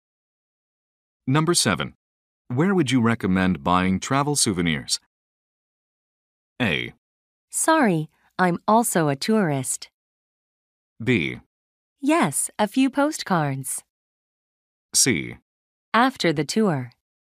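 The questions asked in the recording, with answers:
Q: Where would you recommend buying travel souvenirs?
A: A: Sorry, I'm also a tourist.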